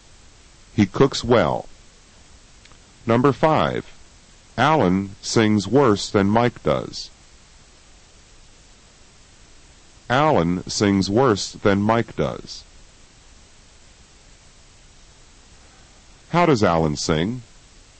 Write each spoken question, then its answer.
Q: How does Alan sing?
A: He sings worse than Mike does.